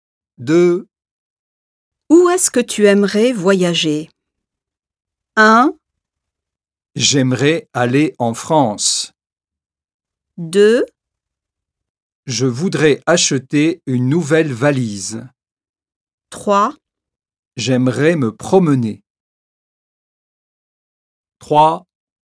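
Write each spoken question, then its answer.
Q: Où est-ce que tu aimerais voyager?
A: 1: J'aimerais aller en France.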